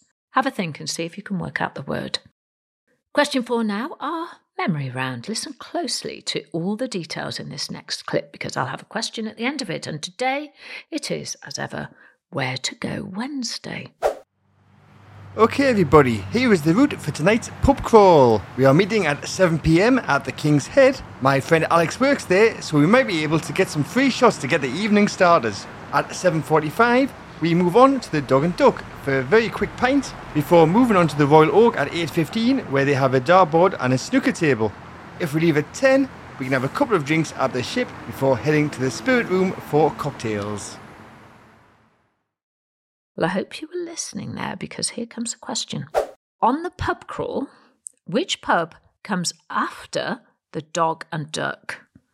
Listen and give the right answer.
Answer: Well, the answer is we're off to the Royal Oak.